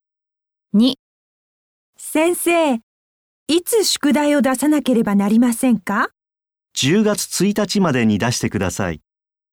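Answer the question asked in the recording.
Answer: 10月1日まで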